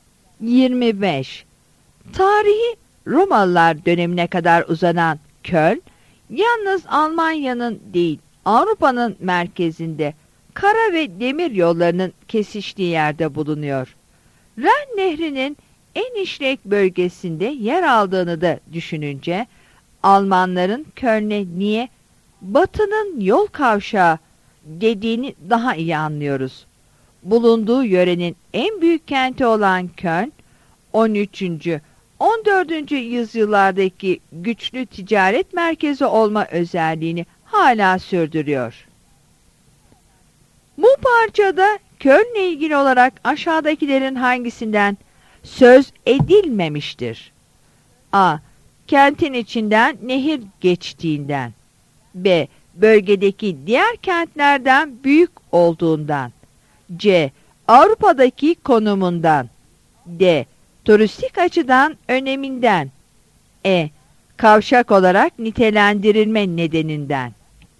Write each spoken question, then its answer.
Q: Bu parçada Köln'le ilgili olarak aşağıdakilerin hangisinden söz edilmemiştir?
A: Yanıt D'dir.